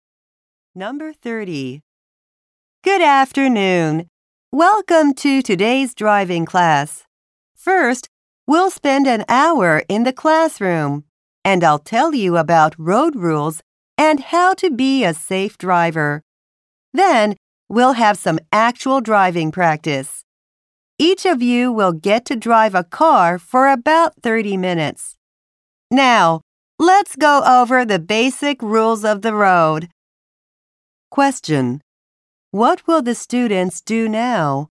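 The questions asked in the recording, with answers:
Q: What will the students do now?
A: Learn about the basic rules of the road.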